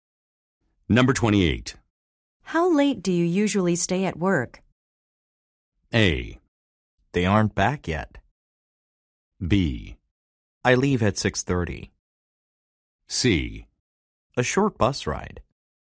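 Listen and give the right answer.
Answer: B: I leave at 6:30.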